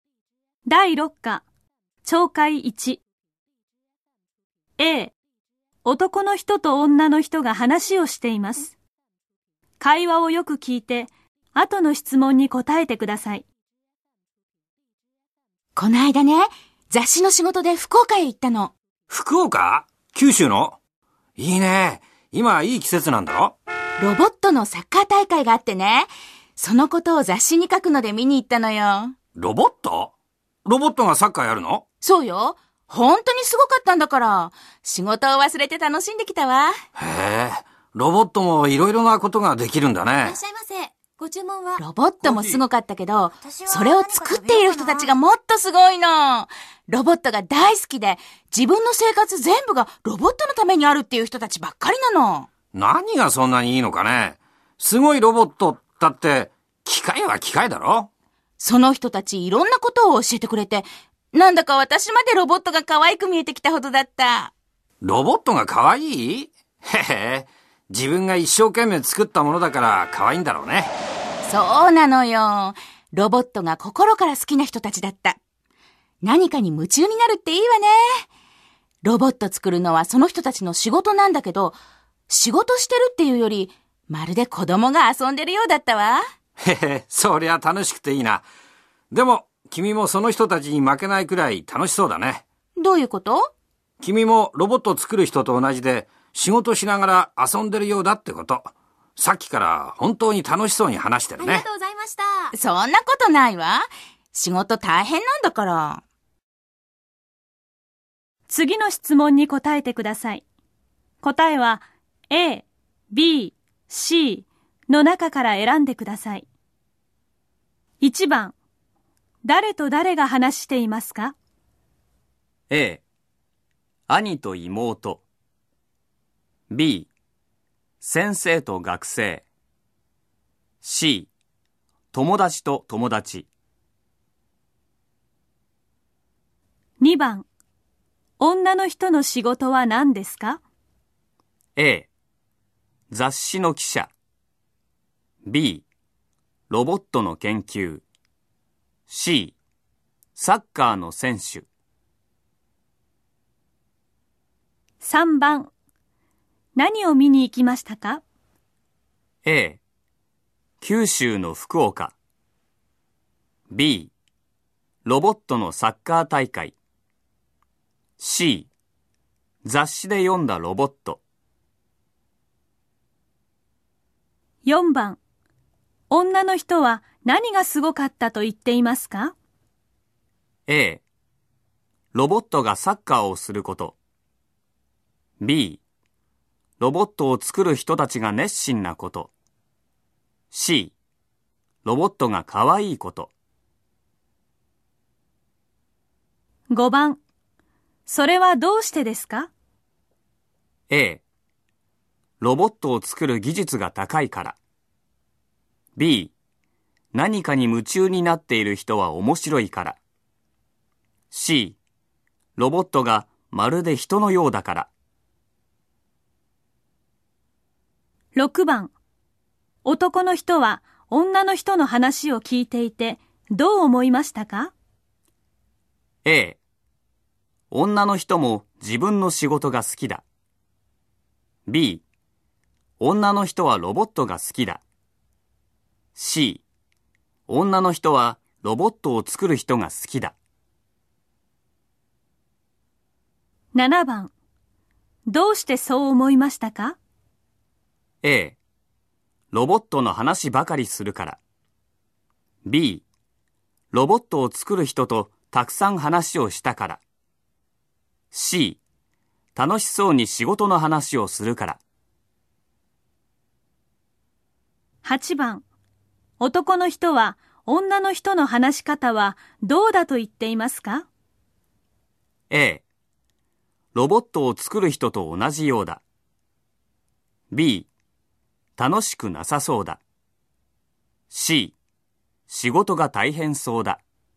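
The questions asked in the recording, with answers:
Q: 誰と誰が話していますか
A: C、友達と友達

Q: 女の人の仕事は何ですか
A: A、雑誌の記者

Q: 何を見に行きましたか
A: B ロボットのサッカー大会

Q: 女の人は何がすごかったと言っていますか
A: B、ロボットを作る人たちが熱心なこと

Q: 男の人は女の人の話を聞いていてどう思いましたか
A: A 女の人も自分の仕事が好きだ

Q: どうしてそう思いましたか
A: C 楽しそうに仕事の話をするから

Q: 男の人は女の人の話し方はどうだと言っていますか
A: A、ロボットを作る人と同じようだ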